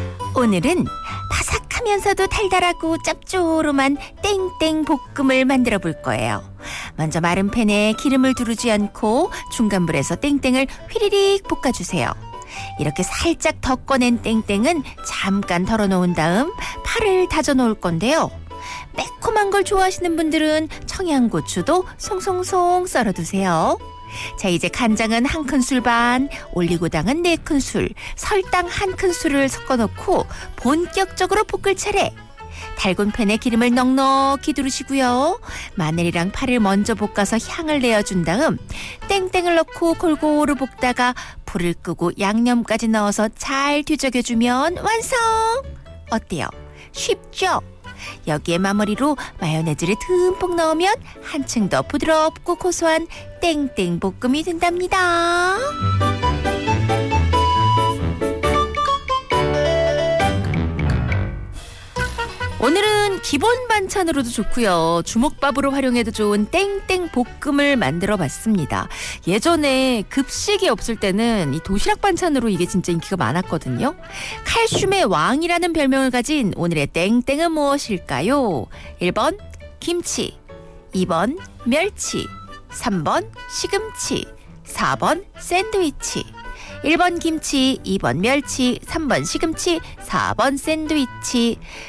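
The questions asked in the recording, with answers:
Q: 칼슘의 왕이라는 별명을 가진 오늘의 땡땡은 무엇일까요?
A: 2: 멸치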